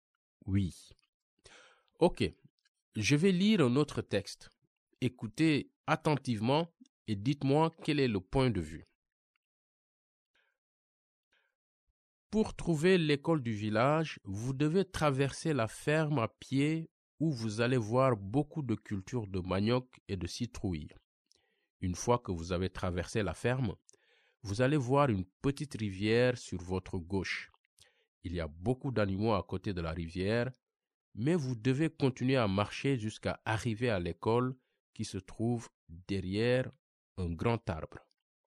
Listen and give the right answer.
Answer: Je pense que c'est la deuxième personne.